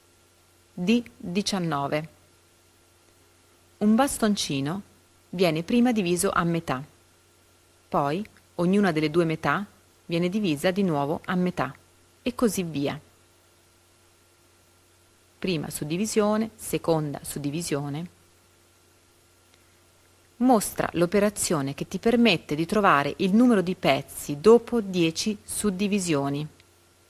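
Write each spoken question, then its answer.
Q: Mostra l'operazione che ti permette di trovare il numero di pezzi dopo 10 suddivisioni.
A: 2 elevato alla 10 = 1024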